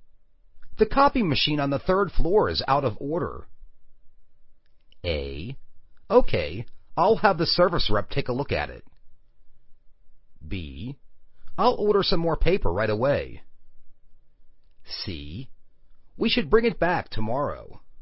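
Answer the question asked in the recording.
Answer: A: Okay, I'll have the service rep take a look at it.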